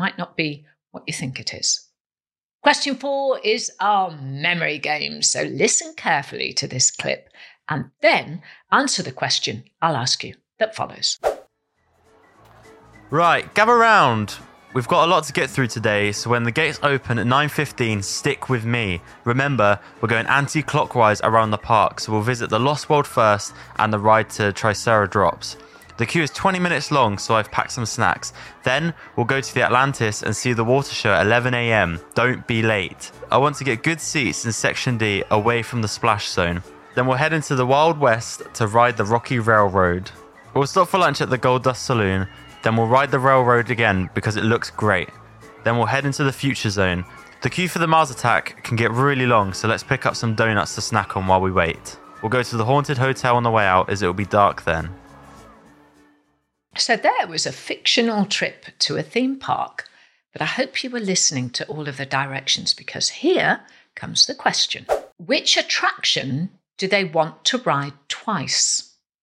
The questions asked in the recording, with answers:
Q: Which attraction do they want to ride twice?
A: It was the Rocky Railroad.